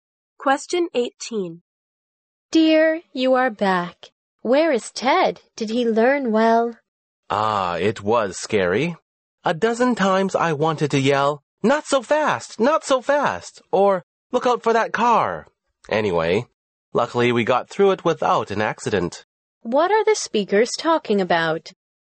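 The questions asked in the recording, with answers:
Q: What are the speakers talking about?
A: Ted's driving lesson.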